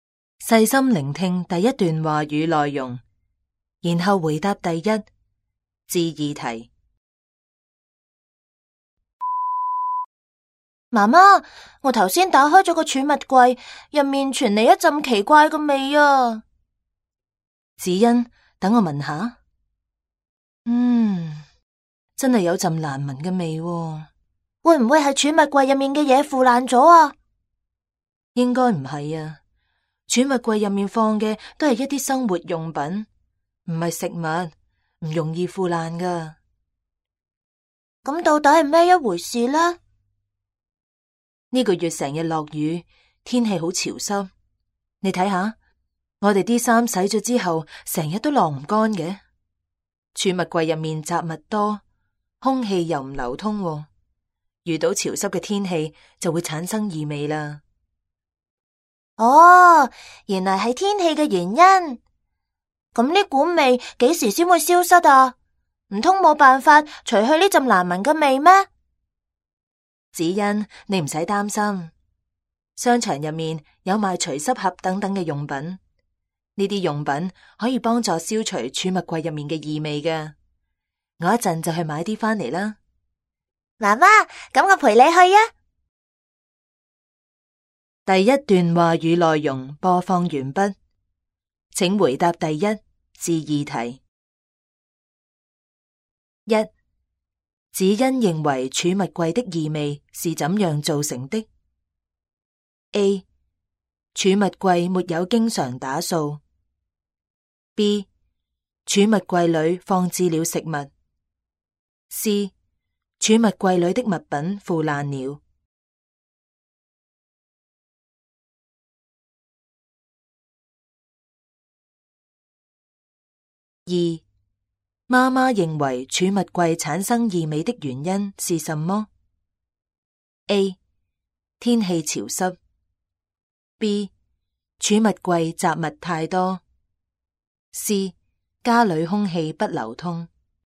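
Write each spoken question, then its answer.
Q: 子欣认为储物柜的异味是怎样造成的 ?A.储物柜没有经常打扫。 B. 储物柜里放置了食物。C. 储物柜里的物品腐烂了。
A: C: 储物柜里的物品腐烂了。

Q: 妈妈认为储物柜产生异味的原因是什么 ?A. 天气潮湿。 B. 储物柜杂物太多。C. 家里空气不流通。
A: A: 天气潮湿。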